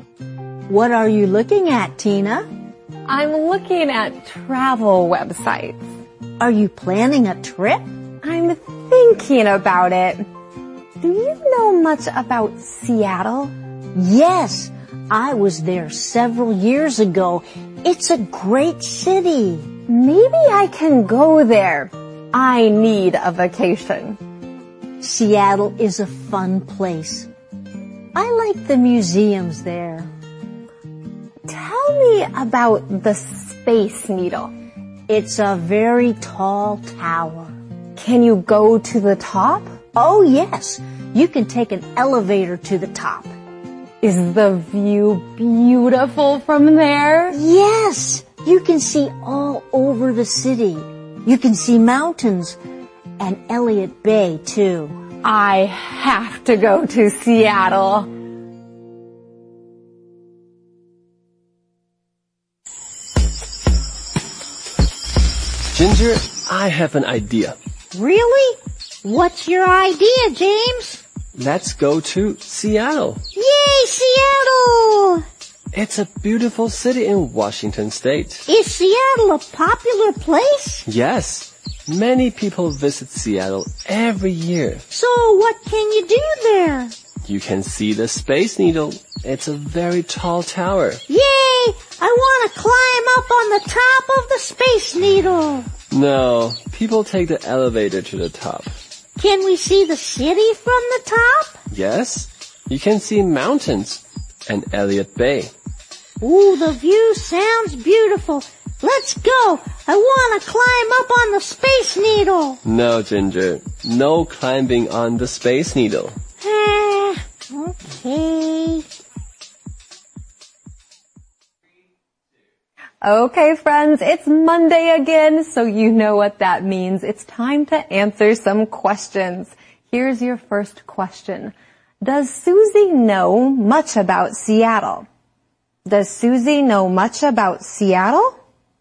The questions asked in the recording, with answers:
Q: Does Susie know much about Seattle?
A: Yes, she does. She was there several years ago.